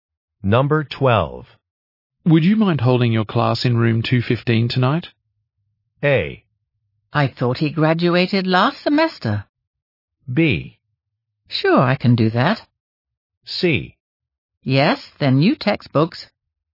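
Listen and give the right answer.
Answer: B: Sure, I can do that.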